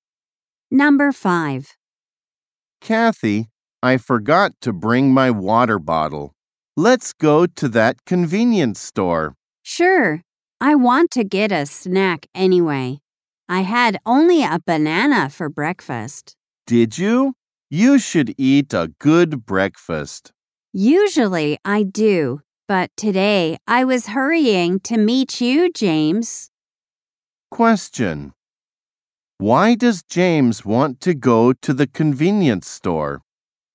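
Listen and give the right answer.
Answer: He forgot his water bottle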